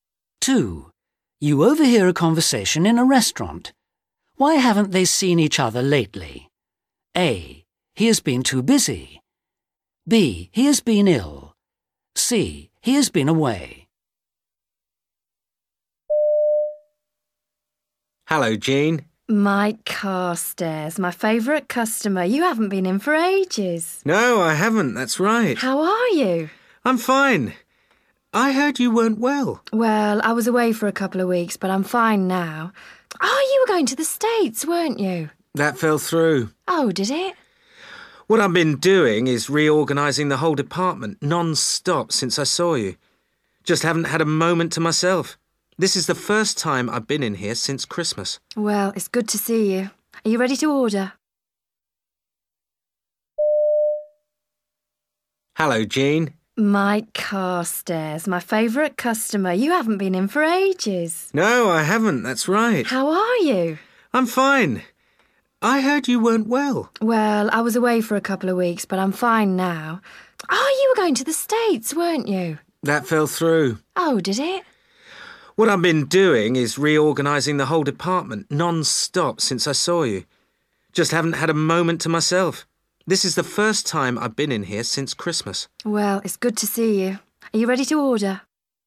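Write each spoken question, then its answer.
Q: Why haven't they seen each other lately?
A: A: He has been too busy.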